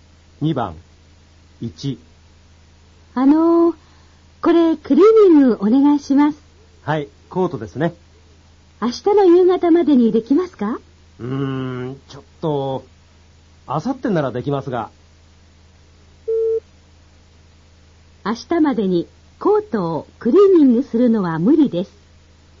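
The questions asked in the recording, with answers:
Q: 明日までにコートをクリーニングするのは無理です。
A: 正しい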